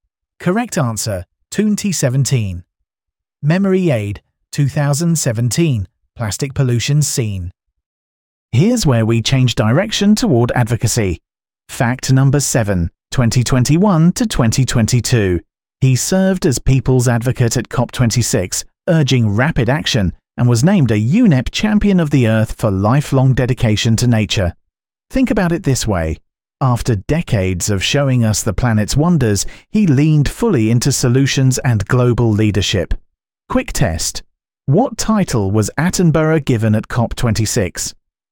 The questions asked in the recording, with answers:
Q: What title was Attenborough given at COP26?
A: Correct answer, People's Advocate.